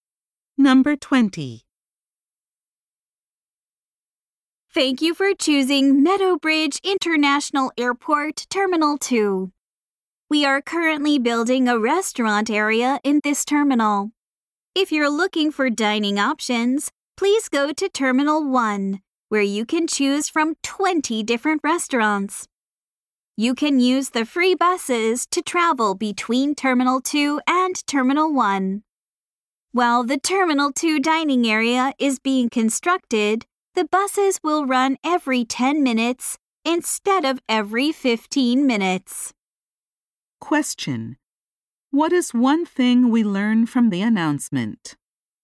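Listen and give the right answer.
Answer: The free buses between terminals will run more often, every 10 minutes, while a restaurant area is built in Terminal 2.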